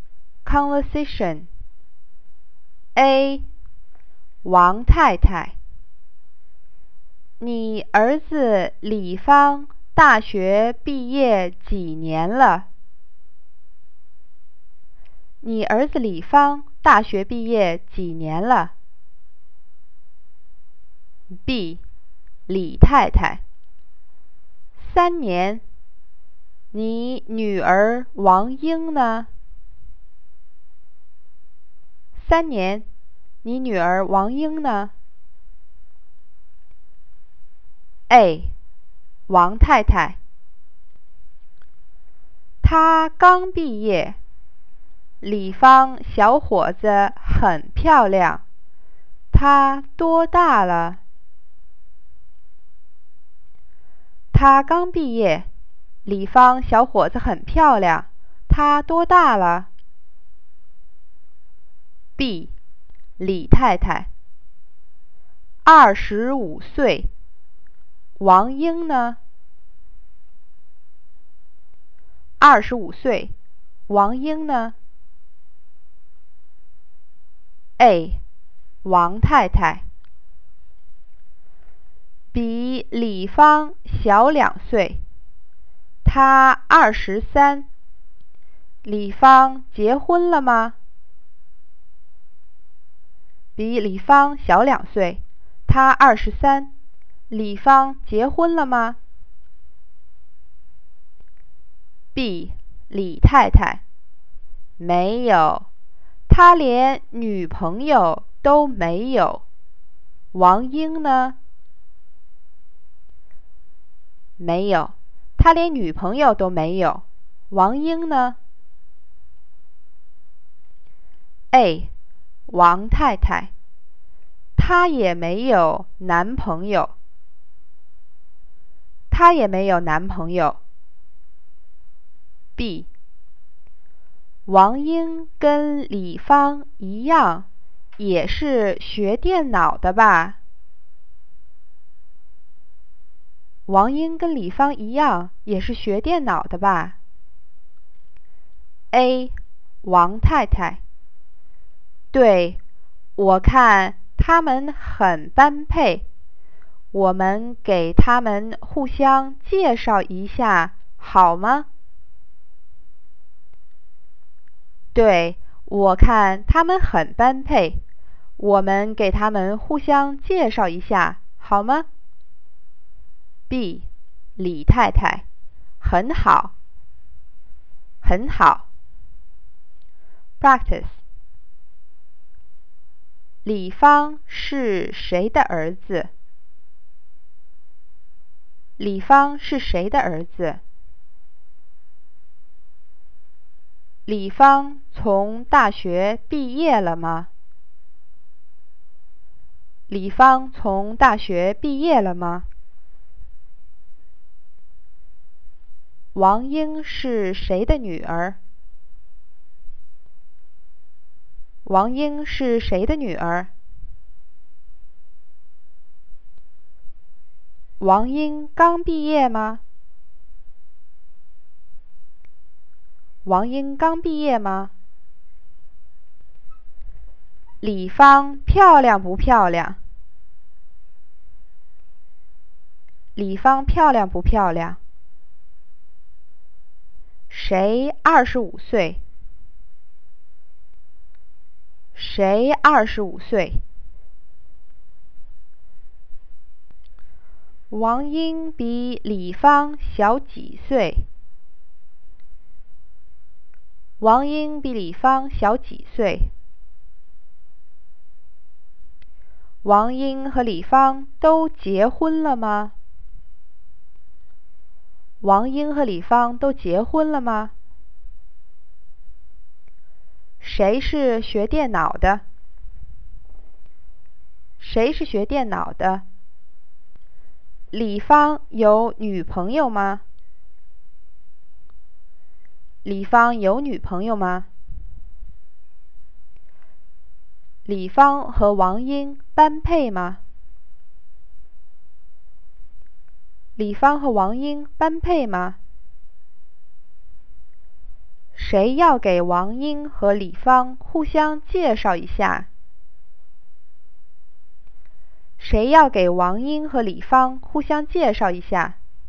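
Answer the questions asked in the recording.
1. 李太太的儿子
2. 毕业了,毕业三年了
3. 王太太的女儿
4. 是,她刚毕业
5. 很漂亮
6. 李芳
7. 小两岁
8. 都没结婚
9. 王英和李芳
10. 没有
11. 很般配
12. 王太太和李太太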